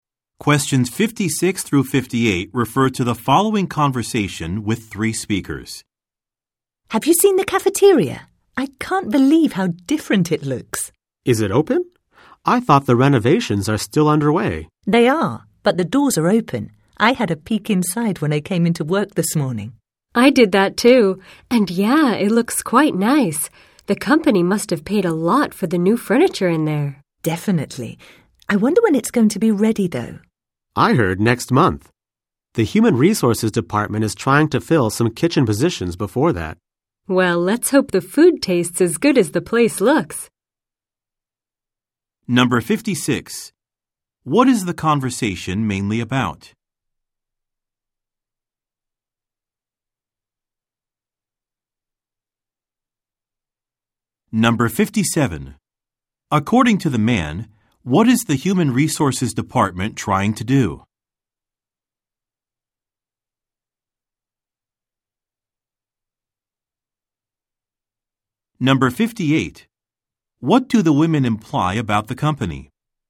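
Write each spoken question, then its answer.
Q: What is the conversation mainly about?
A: The renovation of the company cafeteria

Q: According to the man, what is the Human Resources Department trying to do?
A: Fill some kitchen positions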